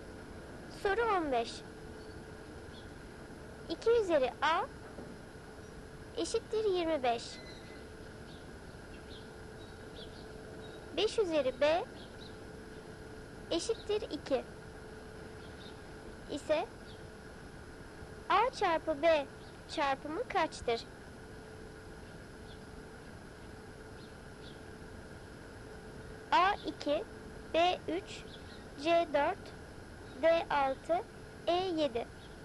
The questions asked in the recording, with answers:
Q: 5 üzeri B eşittir 2. İse A çarpı B çarpımı kaçtır?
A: Doğru cevap A 2.